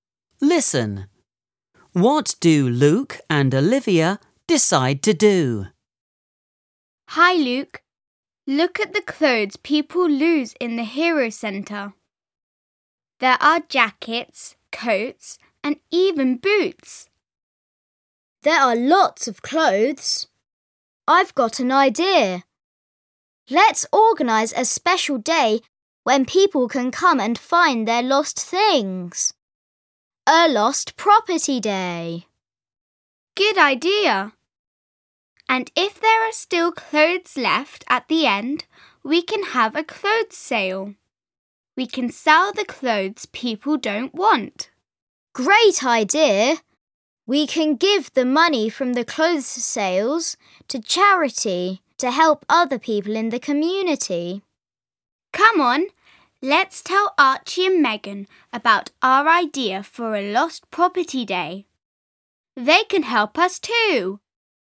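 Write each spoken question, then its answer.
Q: What do Luke and Olivia decide to do?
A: Organise a lost property day, sell leftover clothes and give the money to charity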